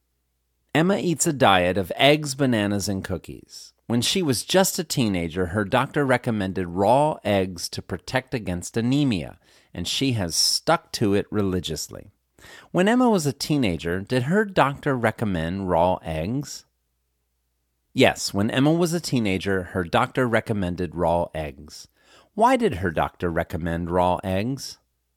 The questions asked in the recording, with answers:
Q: Why did her doctor recommend raw eggs?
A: Her doctor recommended raw eggs to protect against anemia.